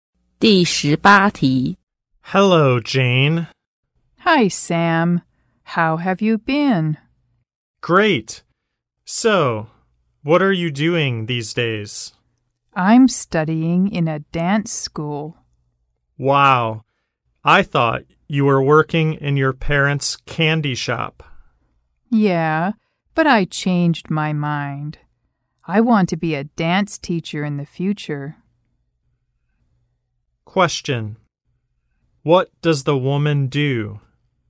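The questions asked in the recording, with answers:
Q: What does the woman do?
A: She studies at a dance school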